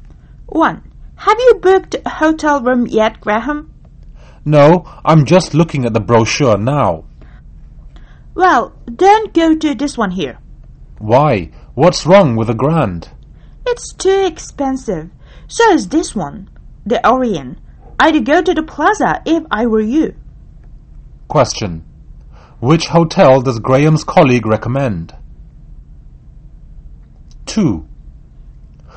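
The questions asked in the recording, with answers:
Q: Which hotel does Graham's colleague recommend?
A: The Plaza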